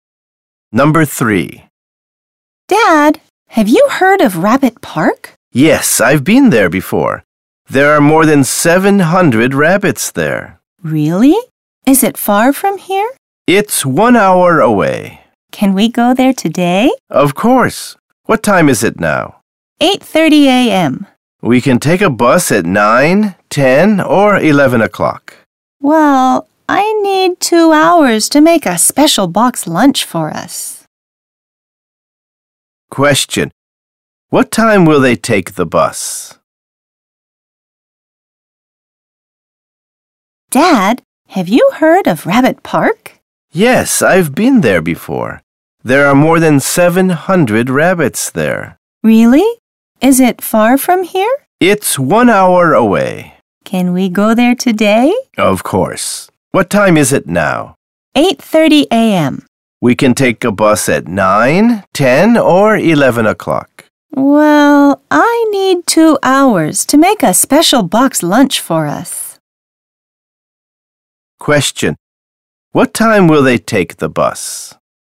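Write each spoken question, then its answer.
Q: What time will they take the bus?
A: At 11 o'clock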